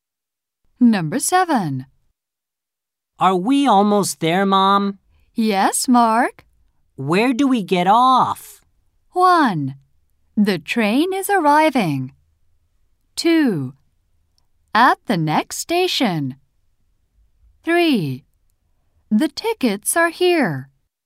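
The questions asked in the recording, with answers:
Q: Where do we get off?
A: 2: At the next station.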